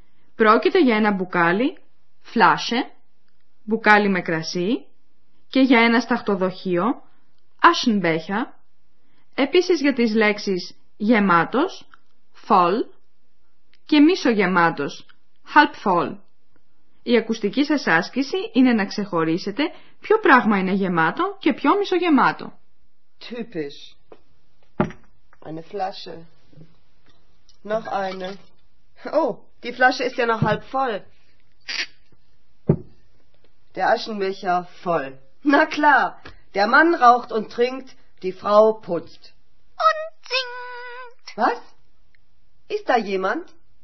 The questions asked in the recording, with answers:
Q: Η ακουστική σας άσκηση είναι να ξεχωρίσετε ποιο πράγμα είναι γεμάτο και ποιο μισογεμάτο.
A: Το σταχτοδοχείο είναι γεμάτο, ένα μπουκάλι με κρασί είναι μισογεμάτο.